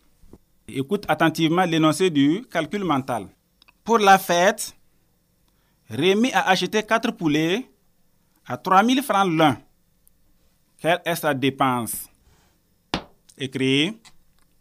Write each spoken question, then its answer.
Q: Pour la fête, Rémi a acheté 4 poulets à 3 000 francs l'un. Quelle est sa dépense?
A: Sa dépense est 12 000 francs.